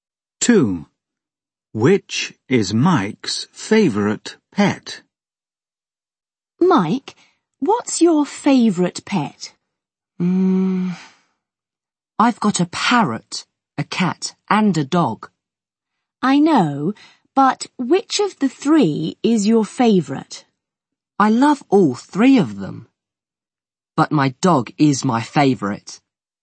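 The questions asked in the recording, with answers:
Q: Which is Mike's favourite pet?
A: His dog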